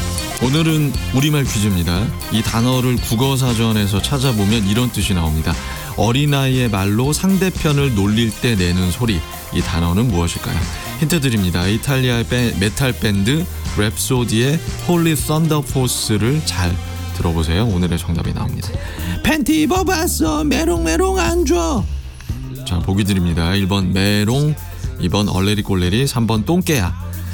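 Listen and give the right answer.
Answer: 1번: 메롱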